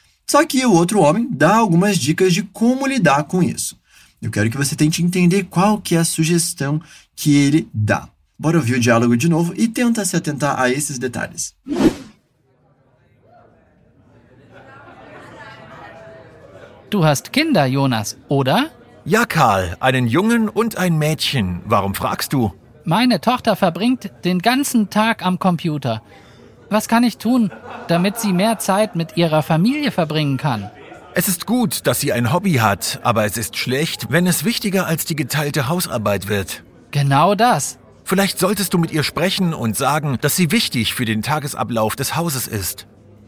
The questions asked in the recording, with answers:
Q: Eu quero que você tente entender qual que é a sugestão que ele dá.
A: Talvez você deveria falar com ela e dizer que ela é importante para a rotina da casa.